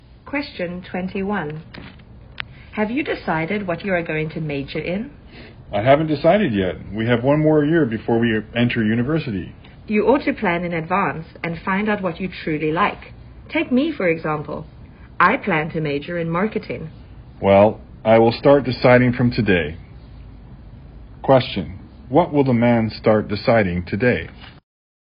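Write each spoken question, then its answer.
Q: what will the man start deciding today?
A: what he is going to major in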